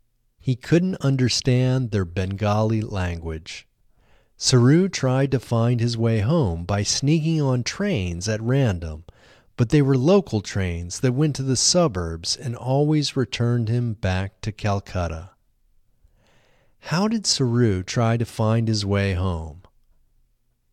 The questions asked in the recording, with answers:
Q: How did Saru try to find his way home?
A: Saru tried to find his way home by sneaking on trains at random.